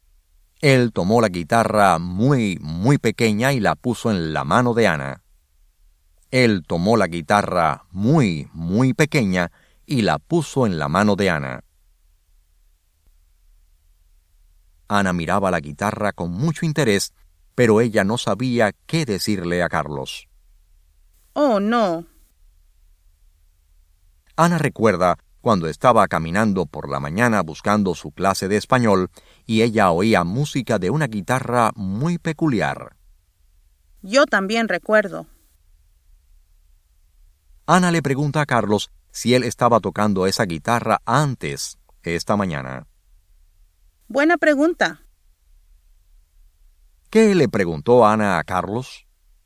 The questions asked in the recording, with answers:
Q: ¿Qué le preguntó Ana a Carlos?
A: Ana le preguntó si él estaba tocando esa guitarra antes esta mañana.